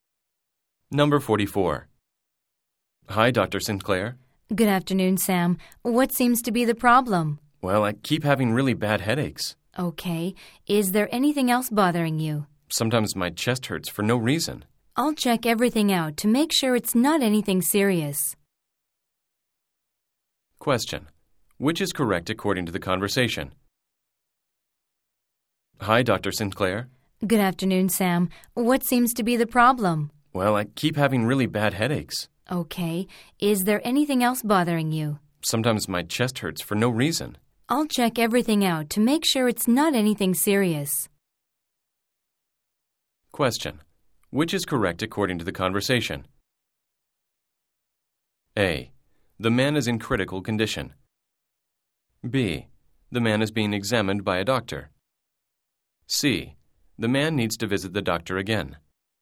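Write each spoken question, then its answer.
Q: Which is correct according to the conversation?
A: B: The man is being examined by a doctor.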